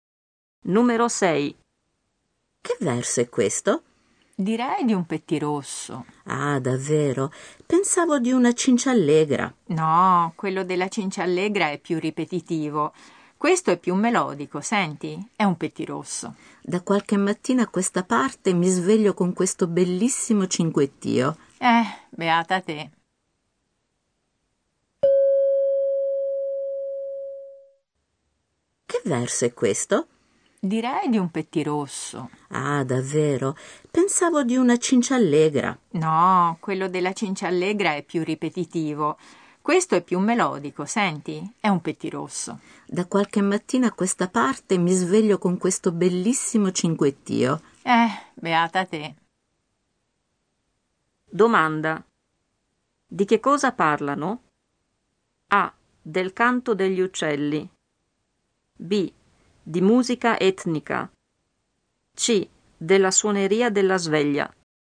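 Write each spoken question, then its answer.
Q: Domanda. Di che cosa parlano?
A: A: Del canto degli uccelli.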